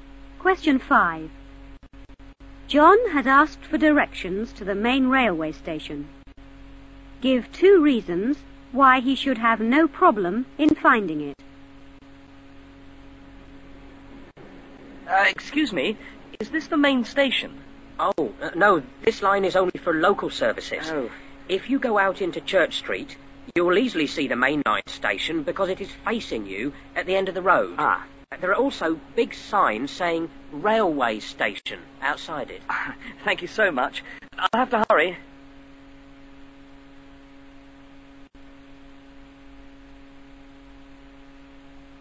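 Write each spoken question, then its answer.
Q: Give 2 reasons why he should have no problem in finding it.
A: It faces you at the end of Church Street; there are big Railway Station signs outside it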